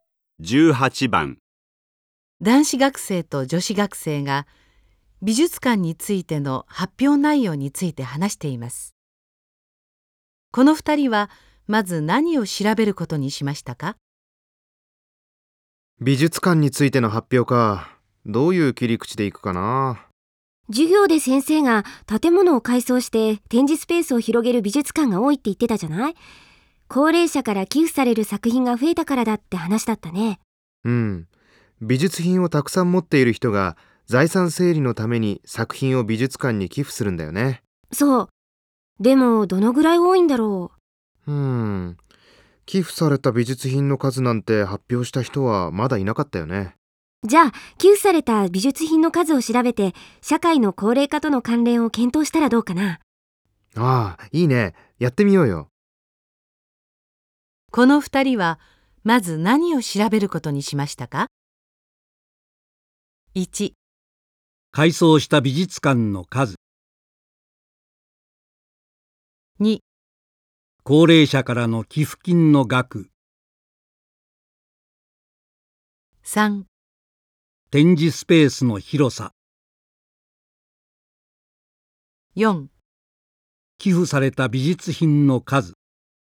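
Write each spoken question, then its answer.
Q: この二人はまず何を調べることにしましたか?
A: 4: 寄付された美術品の数。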